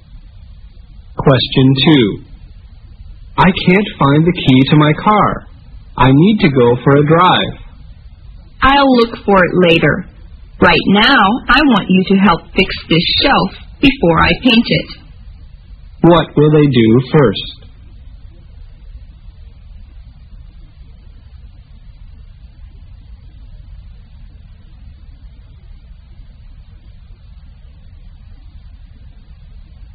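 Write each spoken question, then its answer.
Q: What will they do first?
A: Fix the shelf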